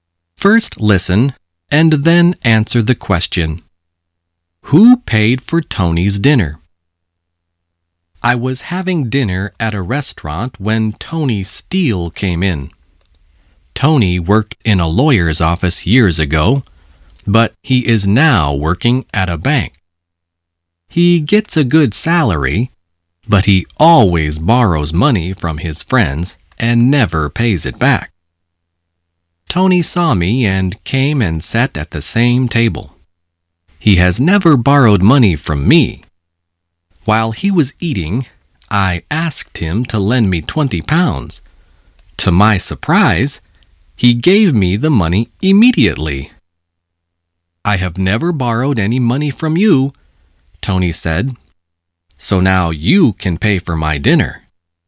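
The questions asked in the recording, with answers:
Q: Who paid for Tony's dinner?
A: The narrator (the writer) paid for it.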